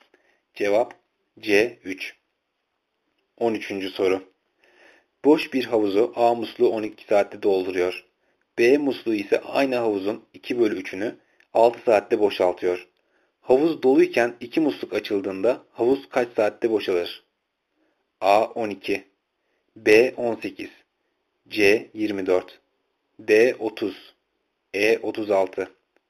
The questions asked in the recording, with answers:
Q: Havuz doluyken 2 musluk açıldığında havuz kaç saatte boşalır?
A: Cevap E 36.